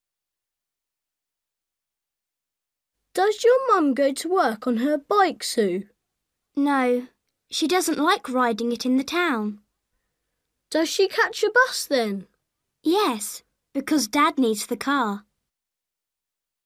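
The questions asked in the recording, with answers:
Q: How does Sue's mum go to work?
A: By bus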